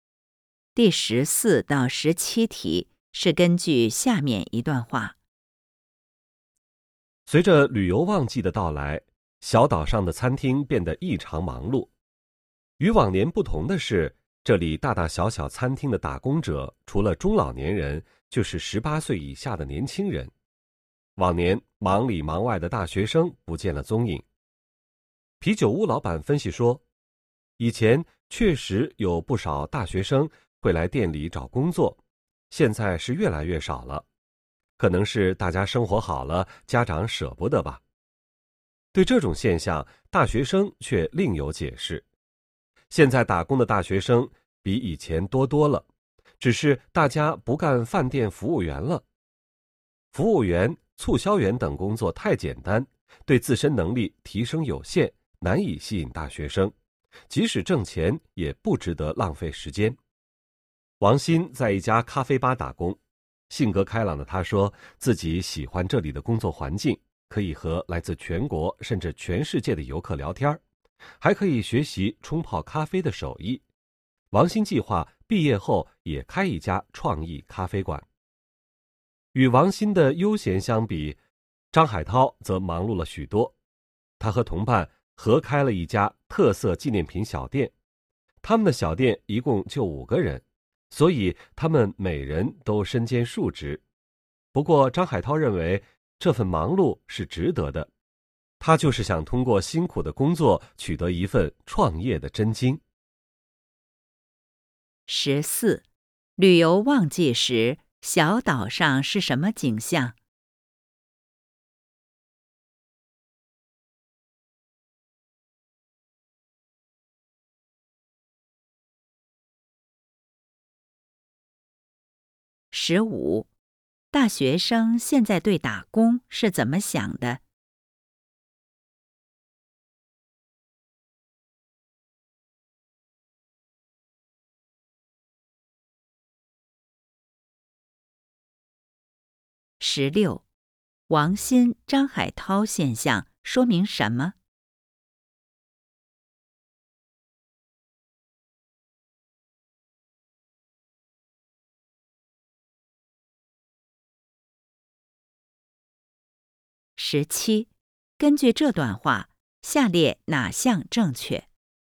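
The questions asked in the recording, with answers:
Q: 旅游旺季时,小岛上是什么景象?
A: 餐厅异常忙碌,打工者多是中老年人和十八岁以下的年轻人,不见大学生

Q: 大学生现在对打工是怎么想的?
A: 服务员等工作太简单,对能力提升有限,不值得浪费时间

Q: 王鑫、张海涛现象说明什么?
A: 大学生打工更注重提升能力、为创业积累经验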